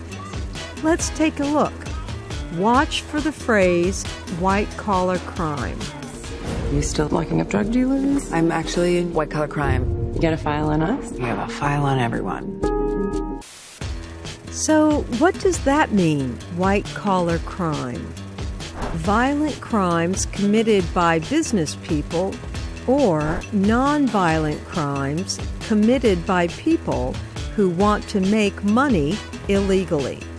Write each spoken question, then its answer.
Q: So, what does that mean, white-collar crime?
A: White-collar crime is a non-violent crime committed by people who want to make money illegally.